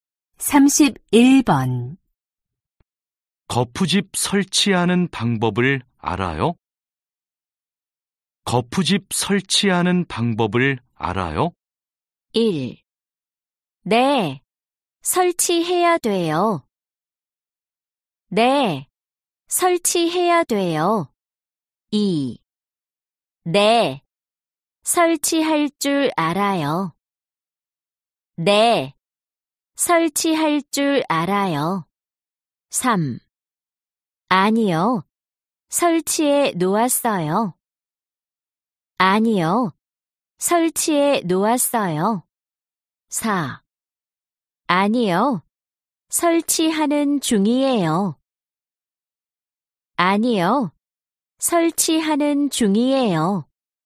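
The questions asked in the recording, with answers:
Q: 거푸집 설치하는 방법을 알아요?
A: 2: 네, 설치할 줄 알아요.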